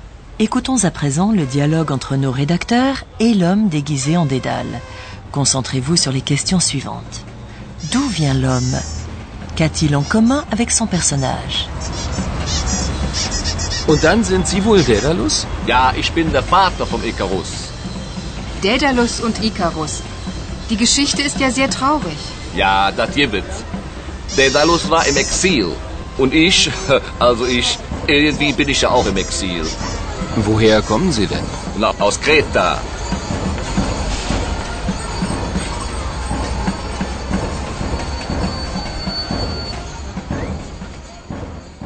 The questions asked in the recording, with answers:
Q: D'où vient l'homme?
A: Avez-vous entendu le nom d'une île grecque, la Crète, Kreta?

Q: Qu'a-t-il en commun avec son personnage?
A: Et c'est cela qu'ont en commun l'homme et le personnage de Dédale.